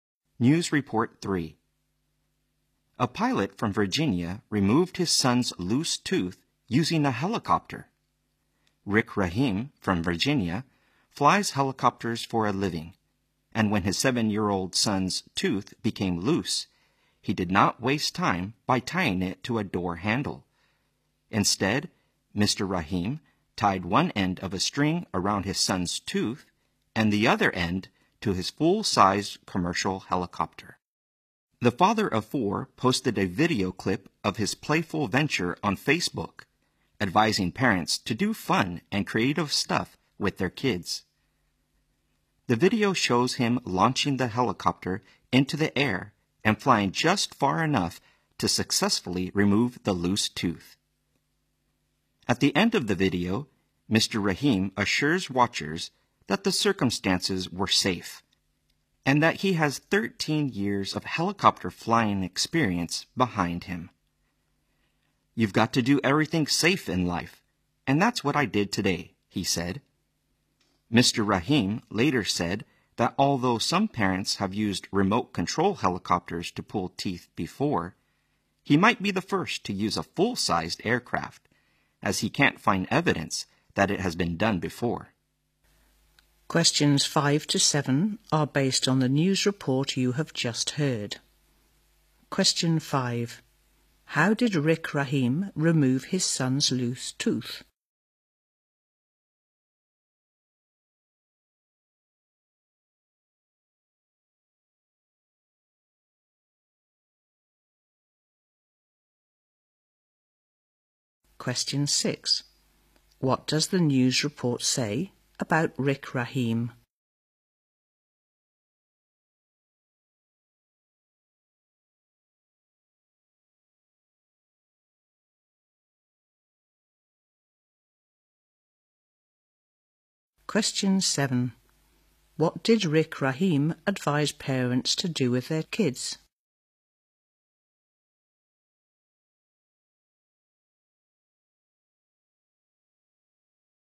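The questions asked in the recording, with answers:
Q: How did Rick Rahim remove his son's loose tooth?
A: He tied it with a string to his helicopter and flew it

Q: What did Rick Rahim advise parents to do with their kids?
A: Do fun and creative stuff with them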